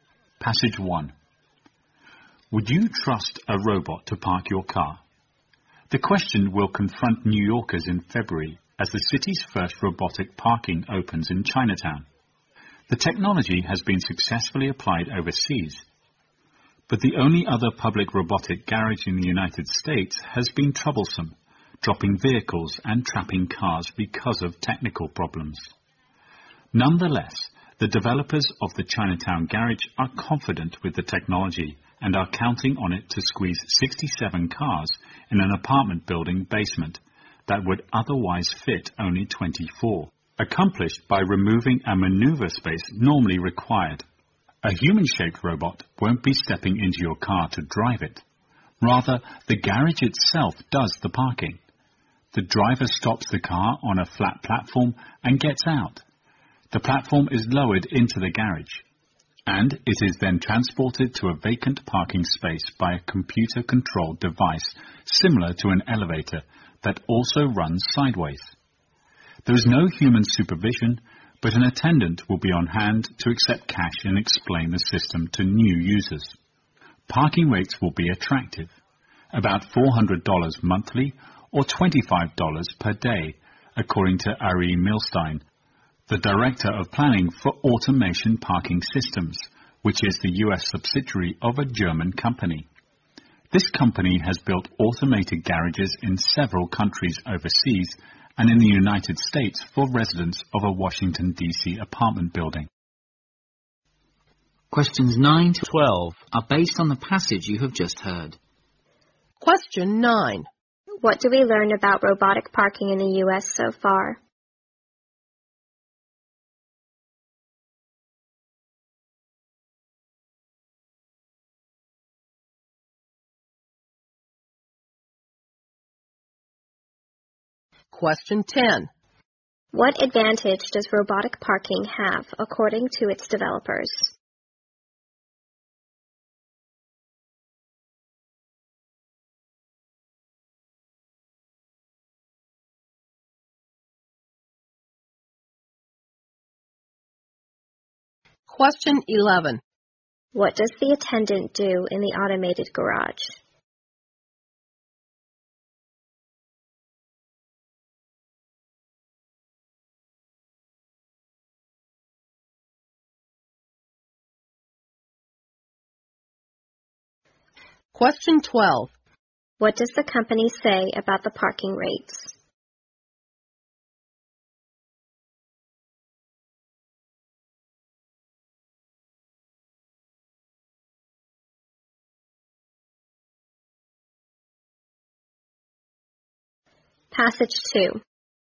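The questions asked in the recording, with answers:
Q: What do we learn about robotic parking in the U.S. so far?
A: The only other public robotic garage has had technical problems

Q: What advantage does robotic parking have according to its developers?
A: It fits many more cars in the same space

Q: What does the attendant do in the automated garage?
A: Accepts cash and explains the system to new users

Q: What does the company say about the parking rates?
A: They will be attractive, about $400 a month or $25 a day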